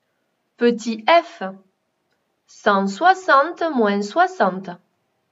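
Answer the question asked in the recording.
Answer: 100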